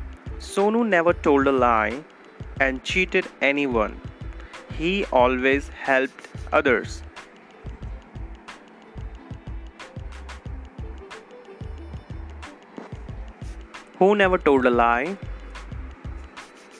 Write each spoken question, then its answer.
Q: Who never told a lie?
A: Sonu. Sonu never told a lie.